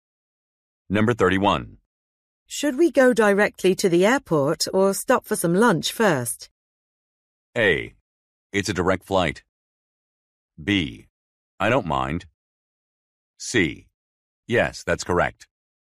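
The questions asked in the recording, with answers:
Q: Should we go directly to the airport or stop for some lunch first?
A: B: I don't mind.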